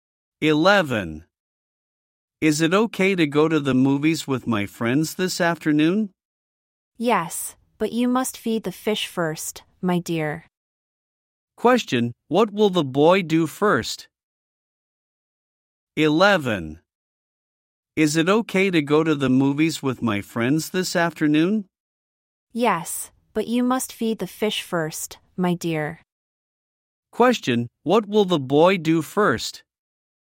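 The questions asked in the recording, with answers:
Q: what will the boy do first?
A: Feed the fish.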